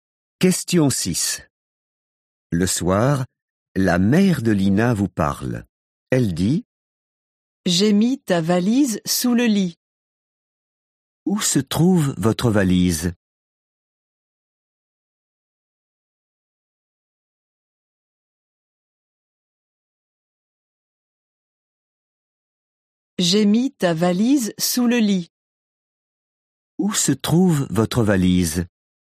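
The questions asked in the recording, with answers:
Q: Où se trouve votre valise?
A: sous le lit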